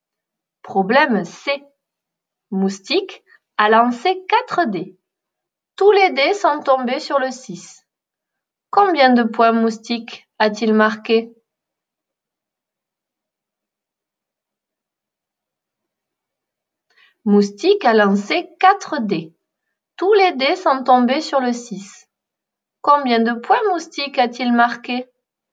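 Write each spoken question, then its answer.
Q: Combien de points Moustique a-t-il marqué?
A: 24 points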